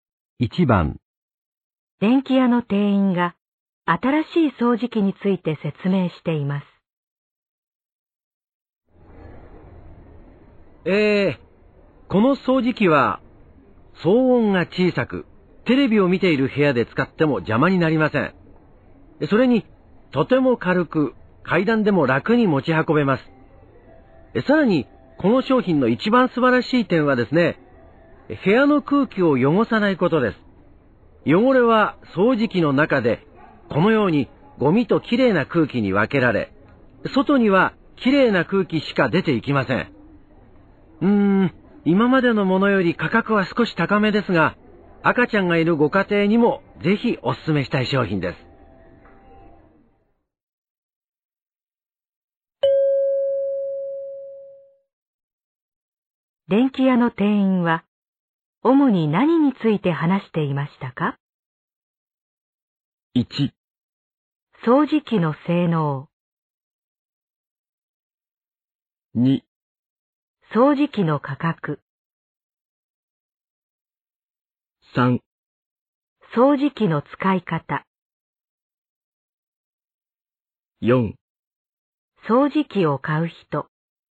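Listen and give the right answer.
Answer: 1: 掃除機の性能。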